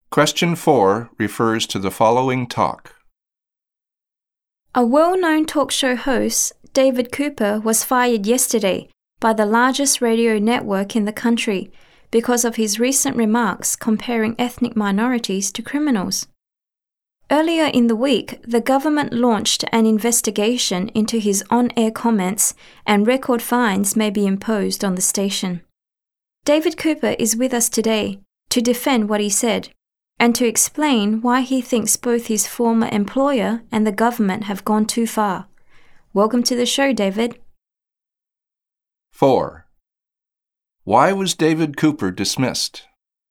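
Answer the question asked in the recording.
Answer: Because of his recent remarks comparing ethnic minorities to criminals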